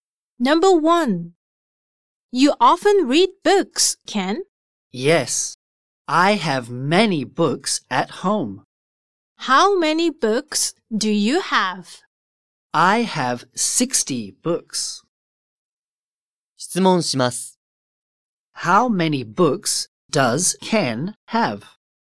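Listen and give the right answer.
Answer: Sixty books.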